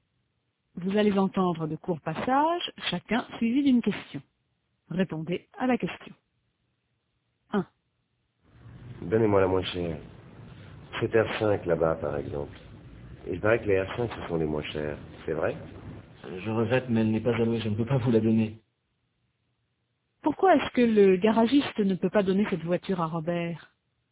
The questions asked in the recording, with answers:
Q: Pourquoi est-ce que le garagiste ne peut pas donner cette voiture à Robert?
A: Parce qu'elle n'est pas allouée.